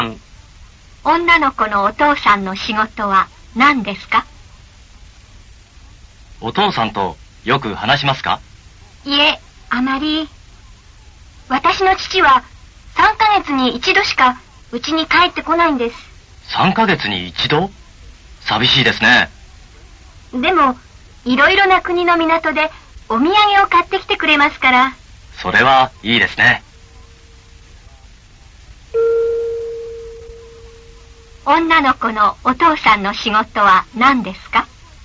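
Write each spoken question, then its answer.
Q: 女の子のお父さんの仕事は何ですか?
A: 船員(船の仕事)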